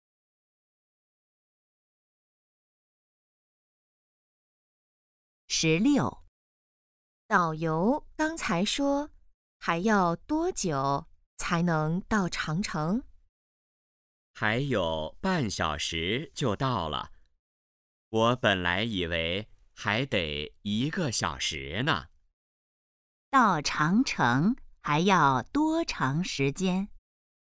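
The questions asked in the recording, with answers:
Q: 到长城还要多长时间?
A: 半小时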